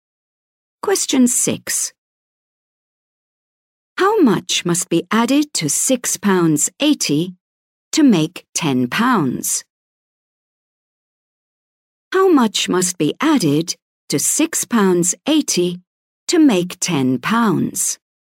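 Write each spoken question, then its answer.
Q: How much must be added to £6.80 to make £10?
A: £3.20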